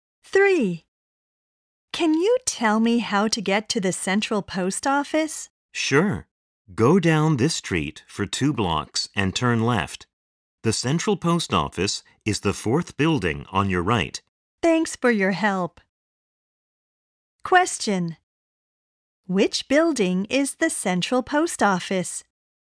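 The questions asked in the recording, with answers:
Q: Which building is the central post office?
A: The 4th building on the right, after going 2 blocks and turning left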